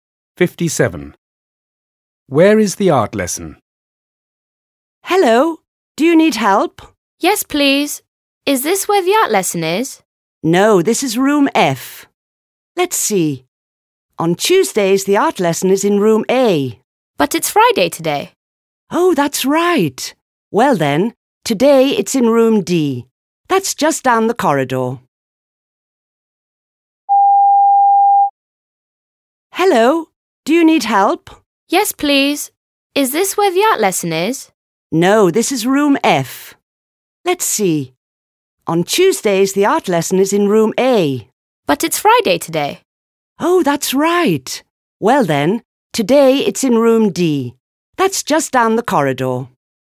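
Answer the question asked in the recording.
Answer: Room D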